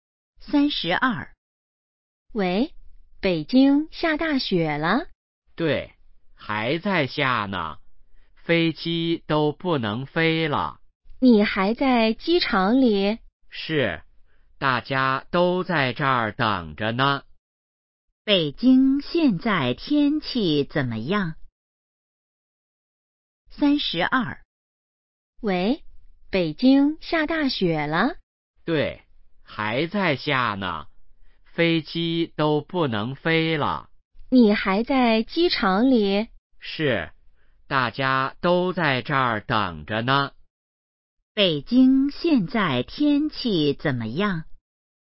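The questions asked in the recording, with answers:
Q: 北京现在天气怎么样?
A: 下大雪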